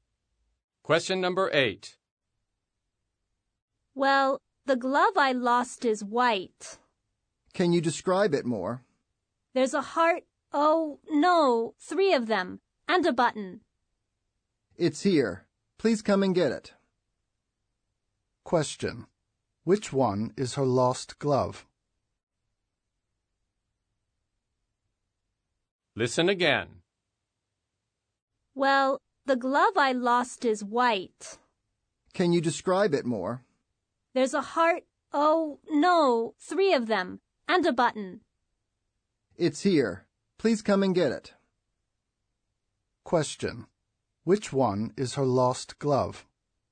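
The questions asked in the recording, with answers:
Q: Question. Which one is her lost glove?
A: The white glove with three hearts and a button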